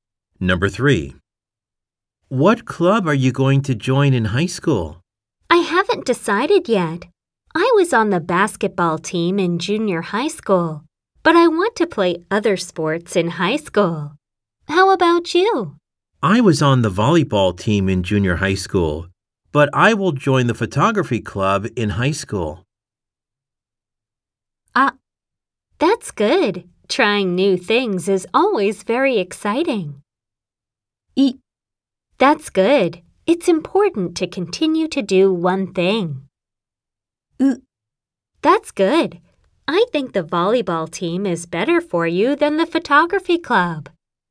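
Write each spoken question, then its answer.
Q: I was on the volleyball team in junior high school, but I will join the photography club in high school.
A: ア: That's good. Trying new things is always very exciting.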